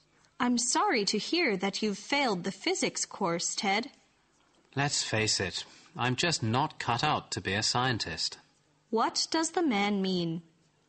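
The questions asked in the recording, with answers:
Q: What does the man mean?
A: He doesn't have the ability to be a scientist.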